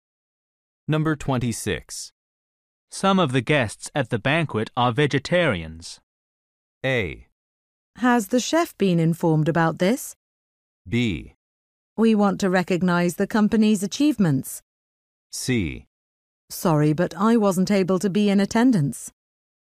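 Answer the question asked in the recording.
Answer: A: Has the chef been informed about this?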